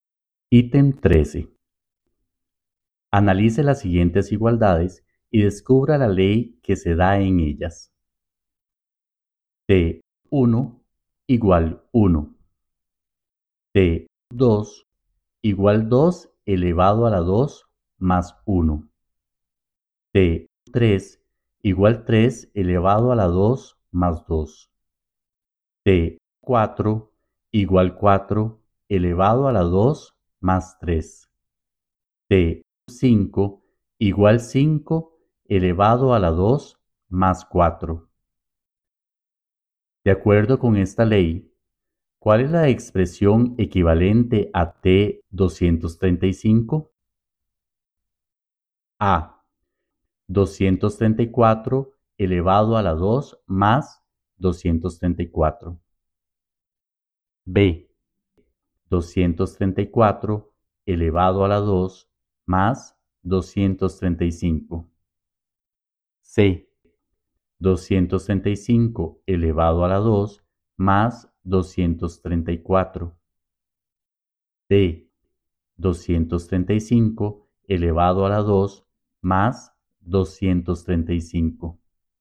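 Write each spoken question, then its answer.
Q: De acuerdo con esta ley, ¿cuál es la expresión equivalente a T235?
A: C: 235 elevado a la 2 más 234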